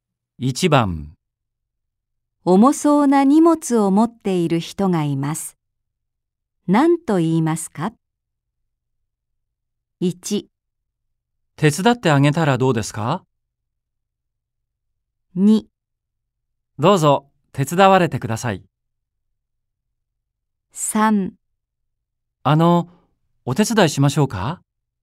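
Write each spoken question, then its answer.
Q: 重そうな荷物を持っている人がいます。何と言いますか ?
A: 3: お手伝いしましょうか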